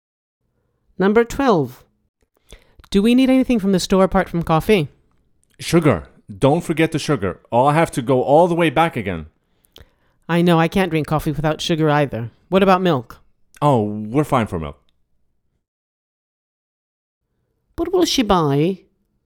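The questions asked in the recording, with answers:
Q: What will she buy?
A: Coffee and sugar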